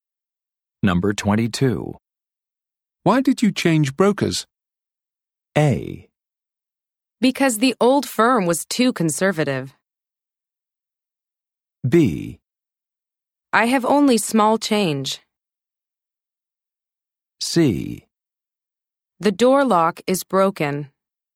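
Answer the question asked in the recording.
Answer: A: Because the old firm was too conservative.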